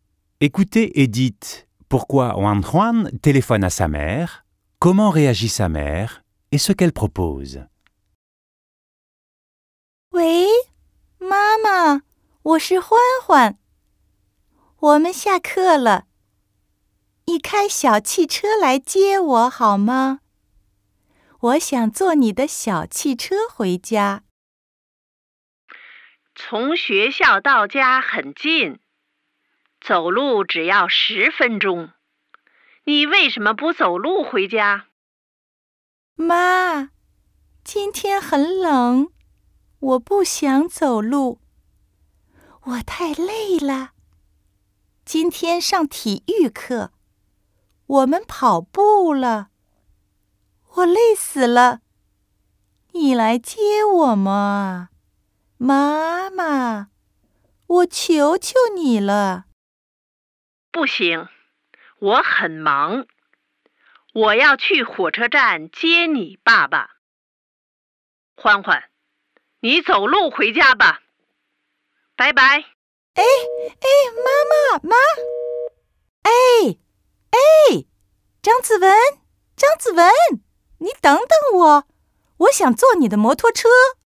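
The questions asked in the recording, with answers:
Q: Écoutez et dites pourquoi Wan Juan téléphone à sa mère, comment réagit sa mère et ce qu'elle propose.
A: Elle veut que sa mère vienne la chercher en voiture parce qu'il fait froid et qu'elle est fatiguée ; la mère refuse, car elle est occupée et doit aller chercher le père à la gare ; elle lui propose de rentrer à pied (c'est à dix minutes).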